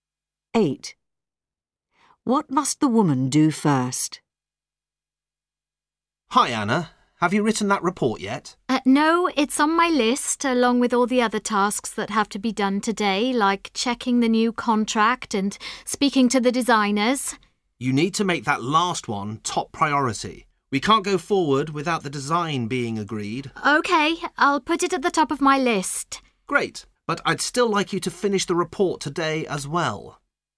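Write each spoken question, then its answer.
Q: What must the woman do first?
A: Speak to the designers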